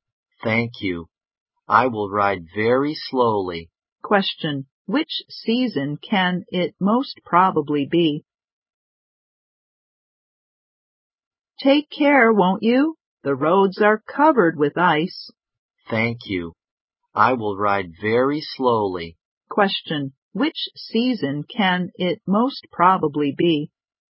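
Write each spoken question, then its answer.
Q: Question, which season can it most probably be?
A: Winter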